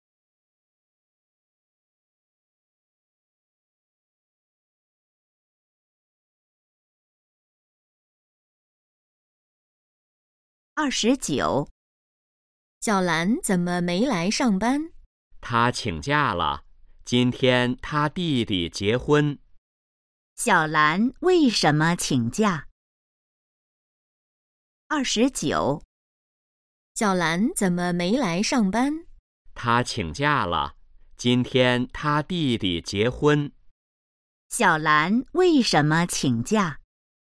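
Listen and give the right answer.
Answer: 她弟弟结婚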